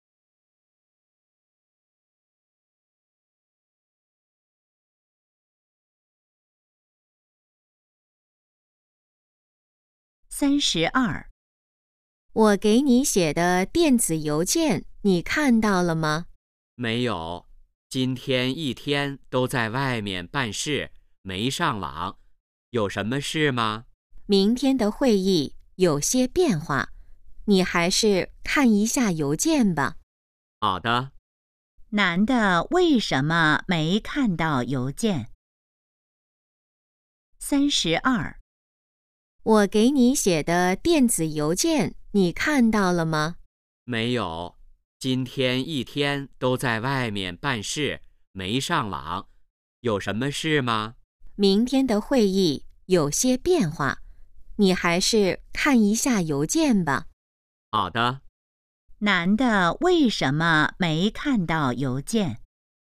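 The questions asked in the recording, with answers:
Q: 男的为什么没看到邮件?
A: 一天在外面办事,没上网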